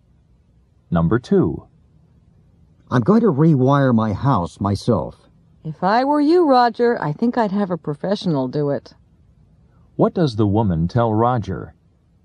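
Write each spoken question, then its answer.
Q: What does the woman tell Roger?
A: He should have a professional rewire his house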